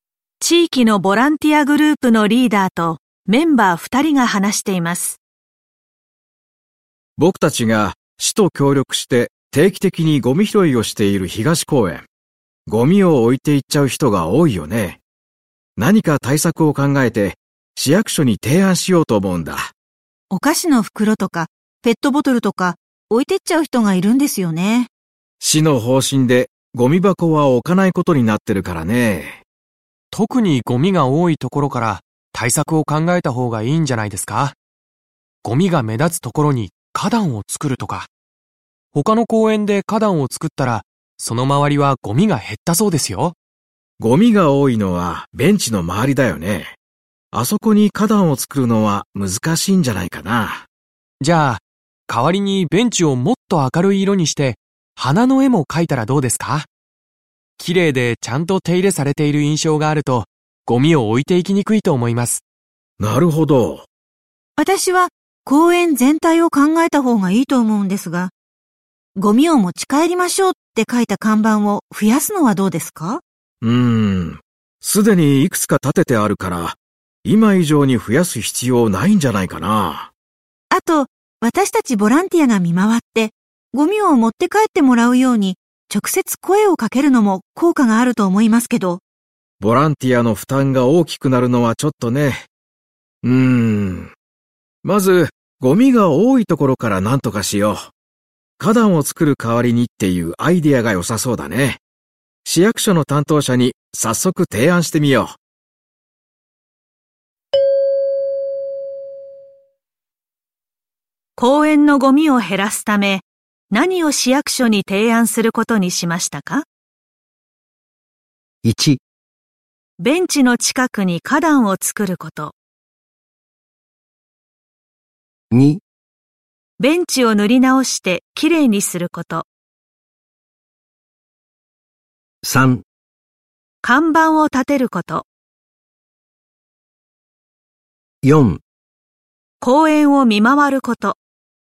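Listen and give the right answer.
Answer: 2: ベンチを塗り直してきれいにすること。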